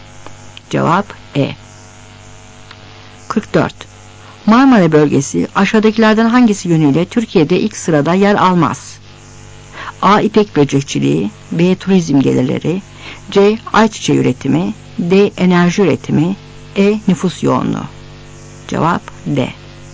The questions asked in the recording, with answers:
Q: Marmara bölgesi aşağıdakilerden hangisi yönüyle Türkiye'de ilk sırada yer almaz?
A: Cevap D.